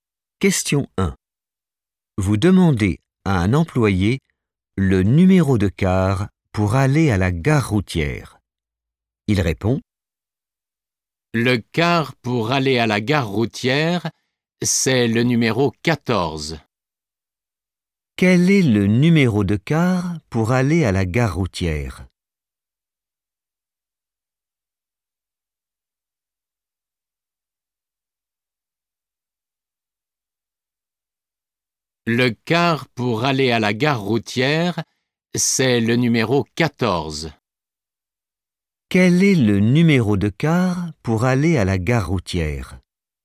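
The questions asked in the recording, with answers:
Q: Quel est le numéro de car pour aller à la gare routière?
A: 14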